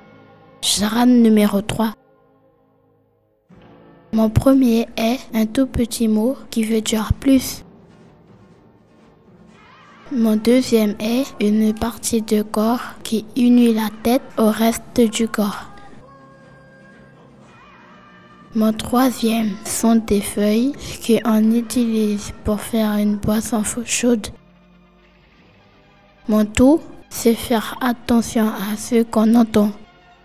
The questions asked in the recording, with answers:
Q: Mon tout, c'est faire attention à ce qu'on entend.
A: écoutez.